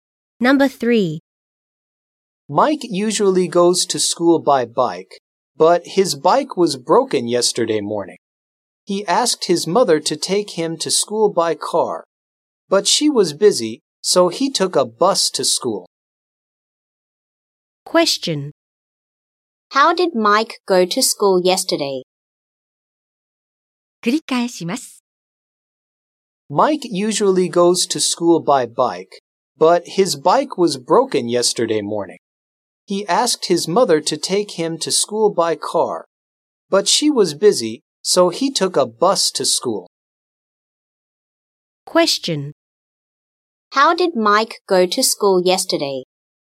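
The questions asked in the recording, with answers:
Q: How did Mike go to school yesterday?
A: By bus.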